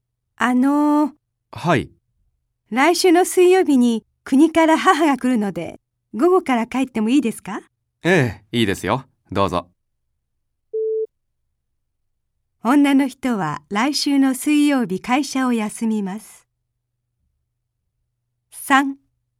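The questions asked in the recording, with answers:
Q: 女の人は来週の水曜日会社を休みます。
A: ×(午後から帰るだけ)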